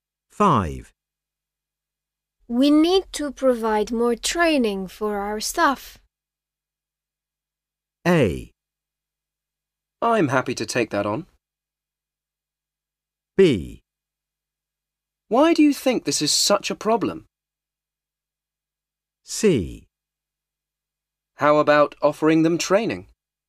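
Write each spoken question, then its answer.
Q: We need to provide more training for our staff.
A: A: I'm happy to take that on.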